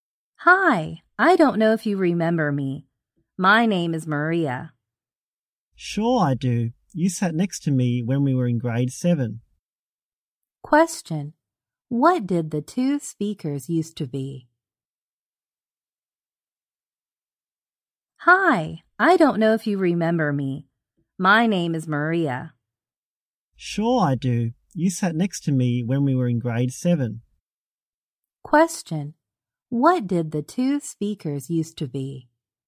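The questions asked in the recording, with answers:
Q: What did the two speakers used to be?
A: Classmates (in grade 7).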